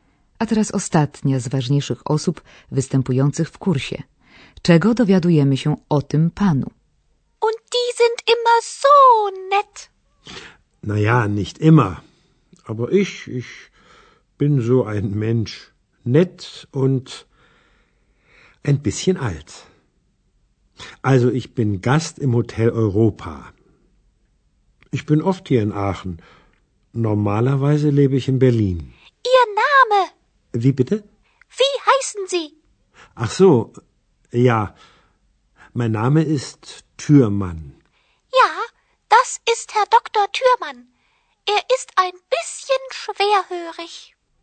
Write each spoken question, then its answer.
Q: Czego dowiadujemy się o tym panu?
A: To doktor Türmann, częsty gość w hotelu Europa.